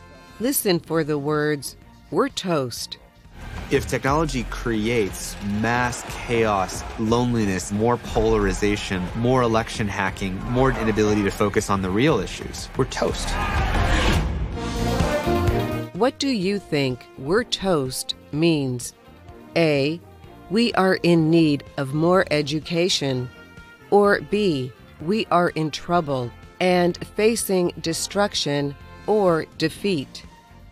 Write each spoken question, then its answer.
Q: What do you think "we're toast" means?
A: The answer is B. We're toast means we are in trouble and facing destruction or defeat.